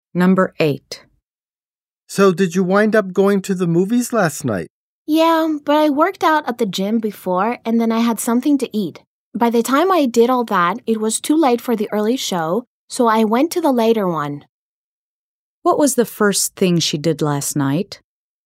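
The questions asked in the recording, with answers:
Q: What was the first thing she did last night?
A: She worked out at the gym.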